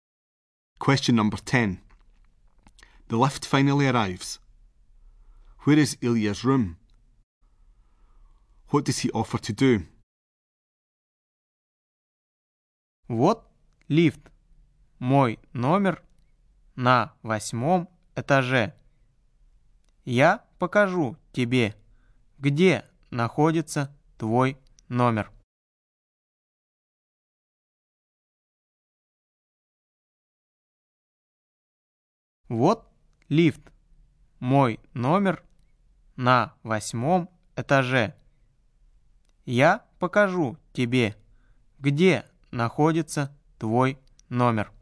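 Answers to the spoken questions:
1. On the 8th floor
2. Show you where your room is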